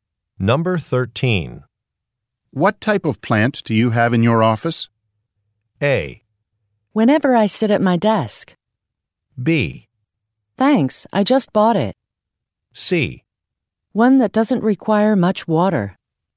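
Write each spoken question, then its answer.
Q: What type of plant do you have in your office?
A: C: One that doesn't require much water.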